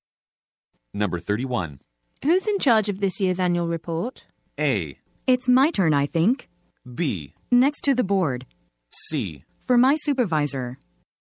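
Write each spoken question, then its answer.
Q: Who's in charge of this year's annual report?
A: A: It's my turn, I think.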